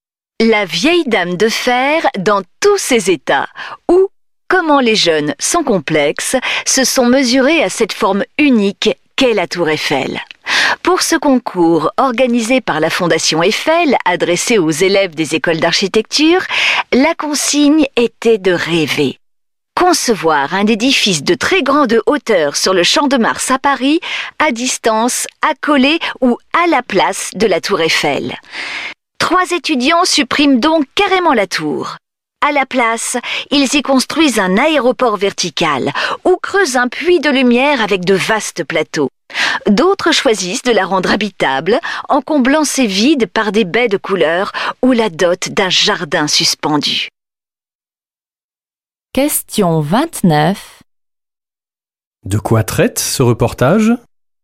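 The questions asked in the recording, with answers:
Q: De quoi traite ce reportage ?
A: D'un concours de la Fondation Eiffel où des étudiants en architecture imaginent un édifice de très grande hauteur sur le Champ de Mars, à côté ou à la place de la tour Eiffel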